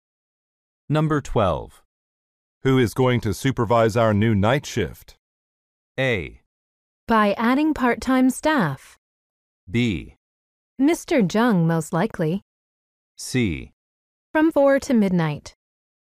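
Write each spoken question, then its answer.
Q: Who is going to supervise our new night shift?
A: B: Mr. Jung, most likely.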